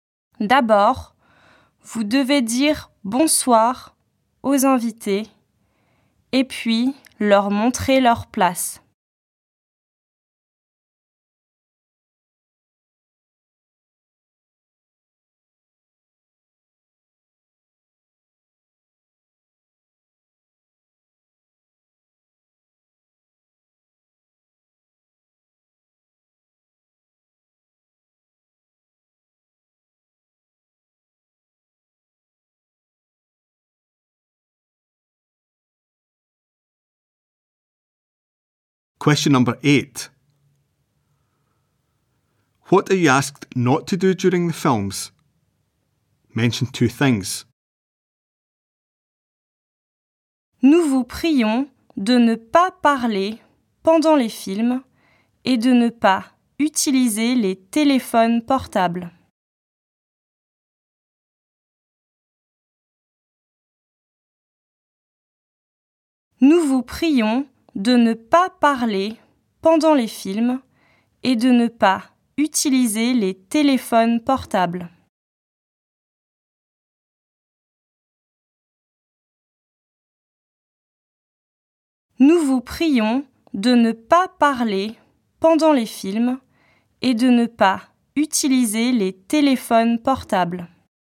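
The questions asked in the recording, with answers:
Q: What are you asked not to do during the films?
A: Talk; use mobile phones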